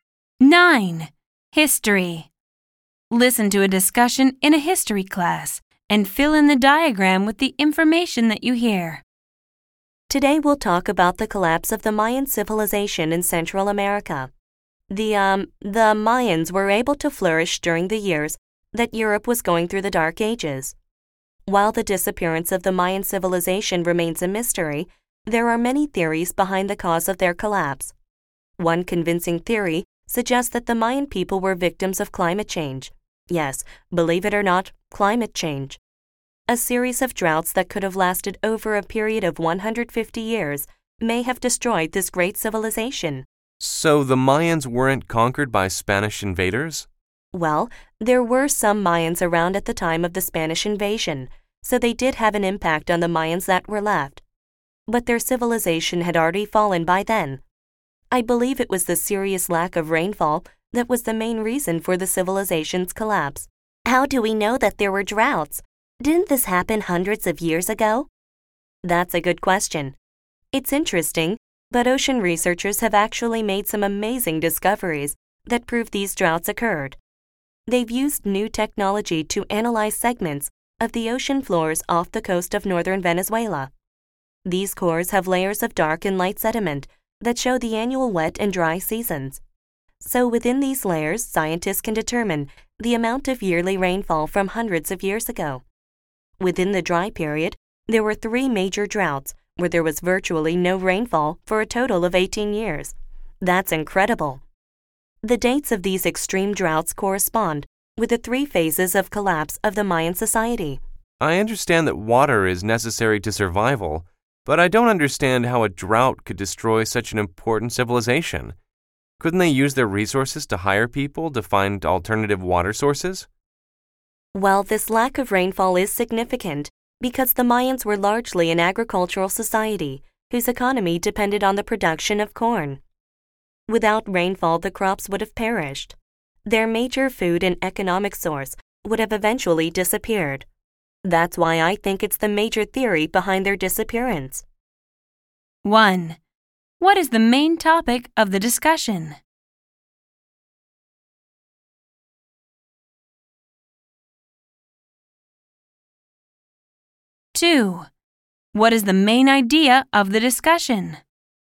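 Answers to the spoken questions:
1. The collapse of the Mayan civilization
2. Droughts (climate change) probably caused the Mayan civilization to collapse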